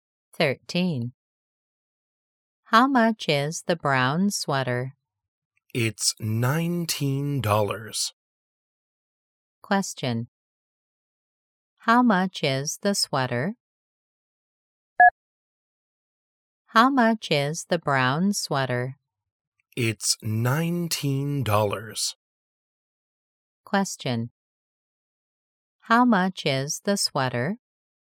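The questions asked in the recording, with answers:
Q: How much is the sweater?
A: $19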